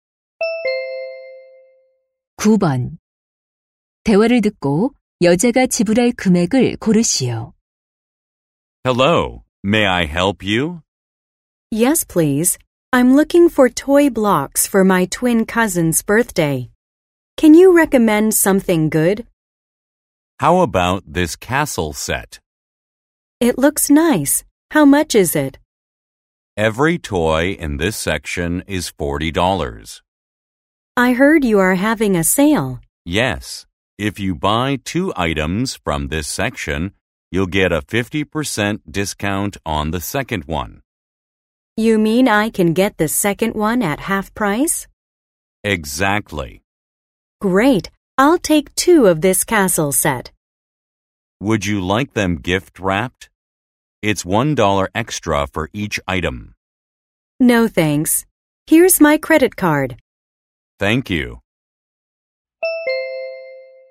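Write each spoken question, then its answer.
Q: 대화를 듣고 여자가 지불할 금액을 고르시오.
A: $60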